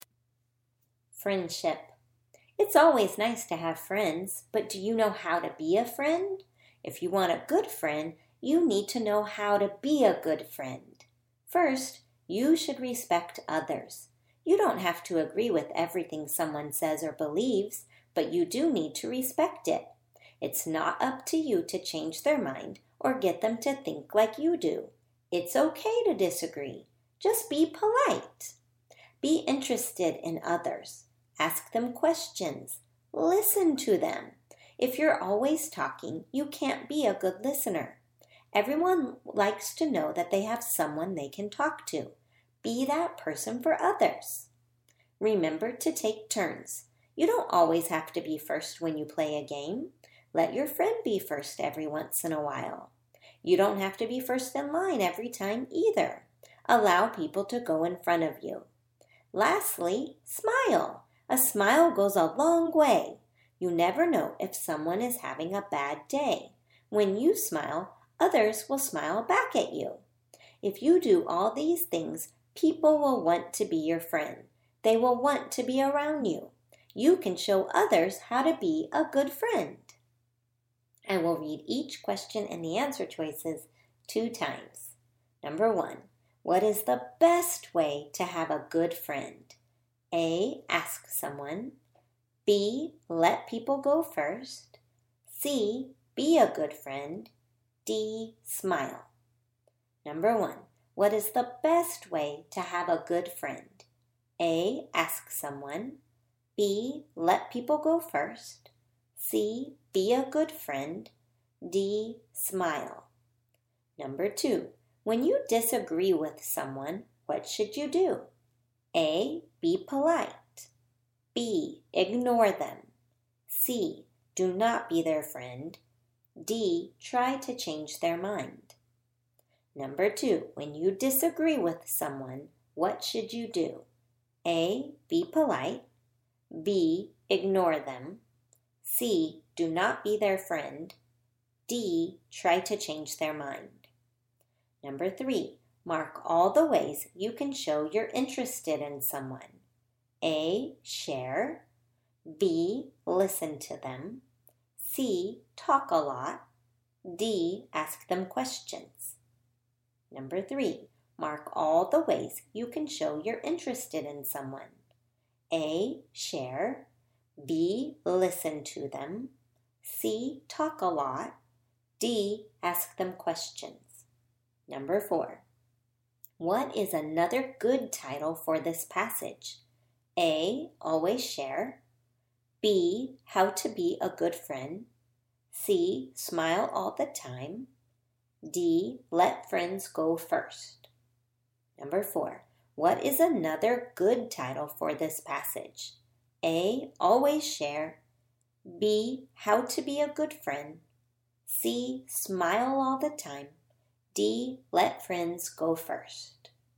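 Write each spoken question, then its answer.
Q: what is the best way to have a good friend?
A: C: be a good friend

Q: when you disagree with someone, what should you do?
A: A: be polite

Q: mark all the ways you can show you're interested in someone.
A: B: listen to them; D: ask them questions

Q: what is another good title for this passage?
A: B: how to be a good friend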